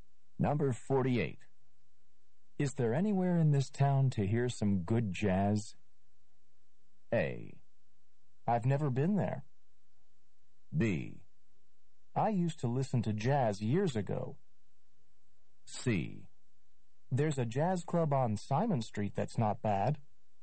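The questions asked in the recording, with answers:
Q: Is there anywhere in this town to hear some good jazz?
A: C: There's a jazz club on Simon Street that's not bad.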